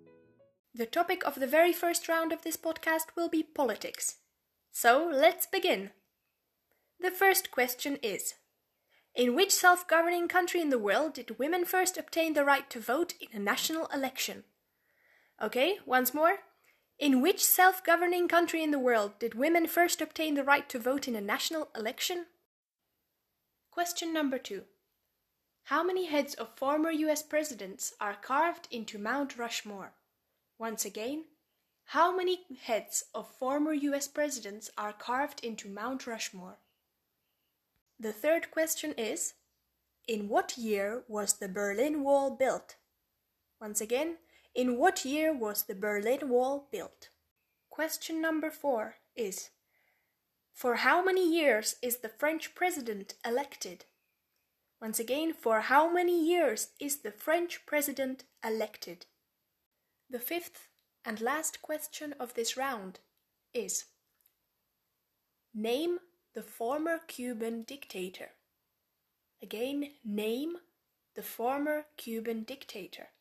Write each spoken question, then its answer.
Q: name the former Cuban dictator.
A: The correct answer to question number five is Fidel Castro.